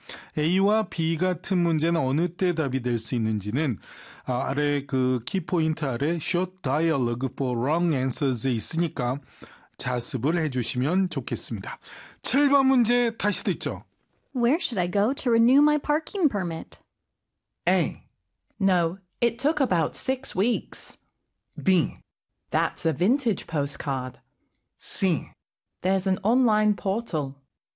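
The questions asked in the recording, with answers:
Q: Where should I go to renew my parking permit?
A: C: There's an online portal.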